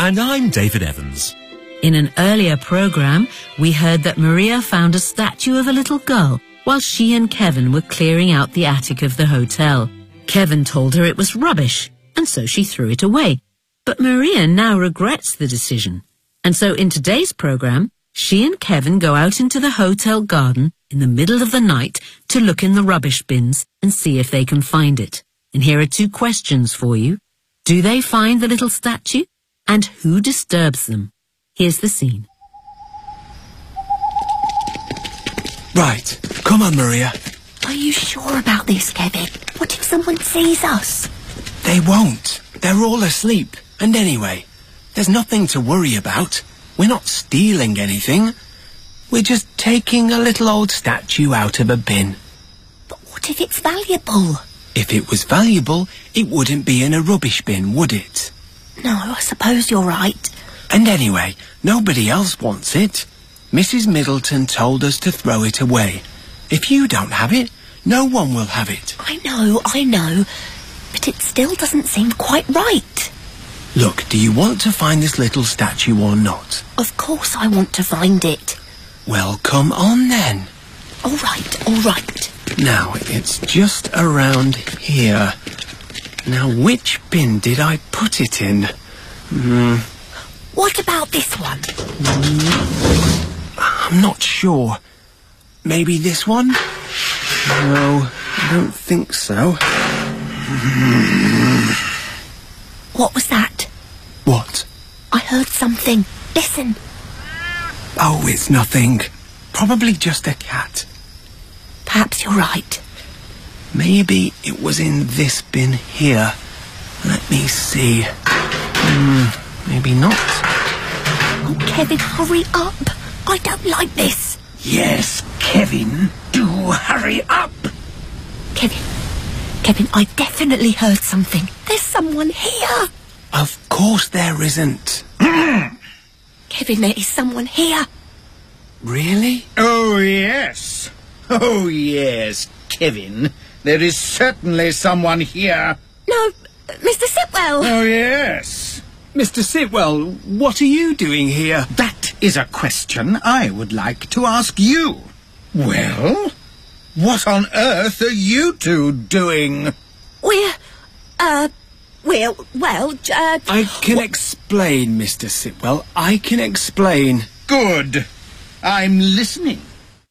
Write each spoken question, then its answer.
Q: Do they find the little statue?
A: No. Kevin says...

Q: And who disturbs them?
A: Sitwell.